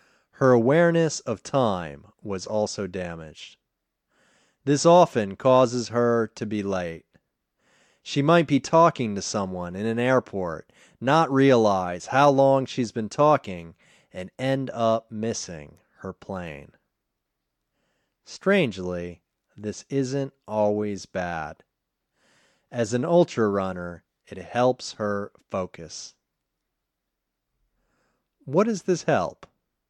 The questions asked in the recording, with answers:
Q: What does this help?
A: It helped her focus.